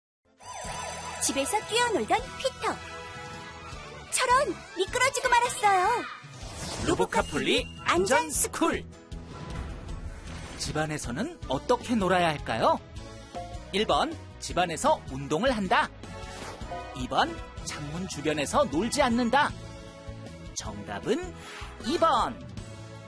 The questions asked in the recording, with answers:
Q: 집안에서는 어떻게 놀아야 할까요?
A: 정답은 2번.